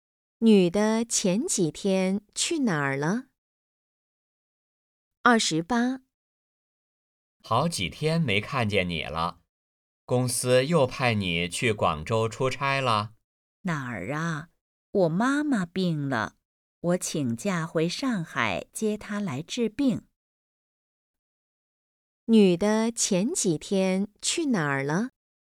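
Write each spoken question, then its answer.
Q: 女的前几天去哪儿了?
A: 上海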